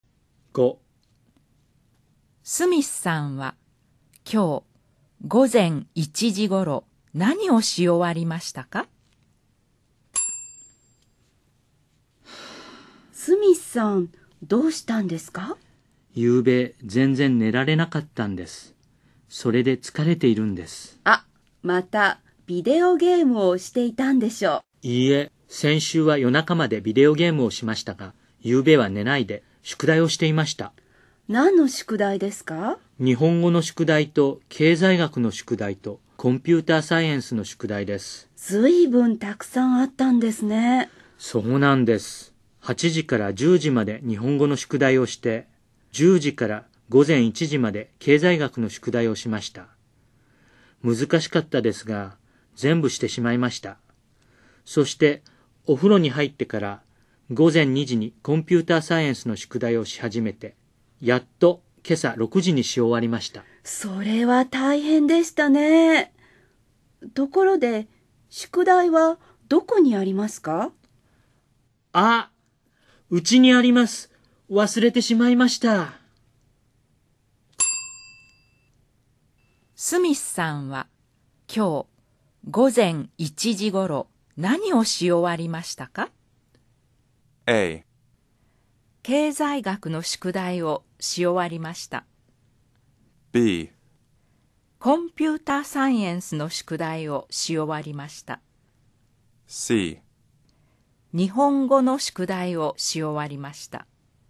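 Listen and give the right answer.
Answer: A: 経済学の宿題をし終わりました。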